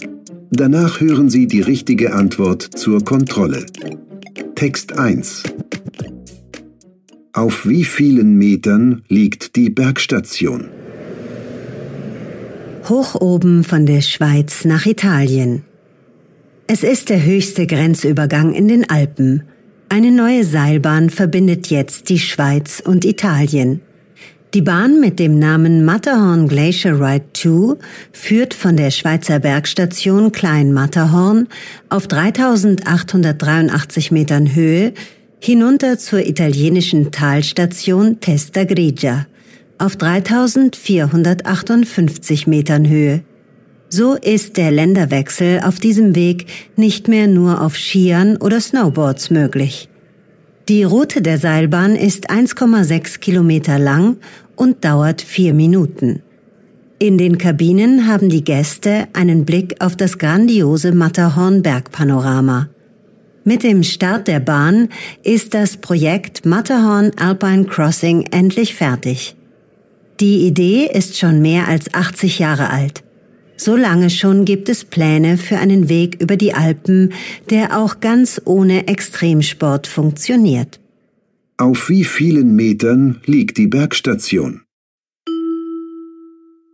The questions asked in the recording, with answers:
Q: Auf wie vielen Metern liegt die Bergstation?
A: Die Bergstation Klein Matterhorn liegt auf 3883 Metern.